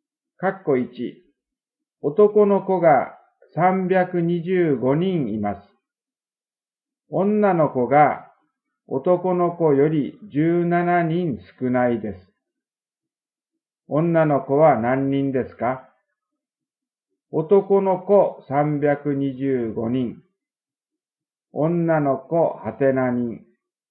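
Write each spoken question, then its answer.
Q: 女の子は何人ですか?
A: 308人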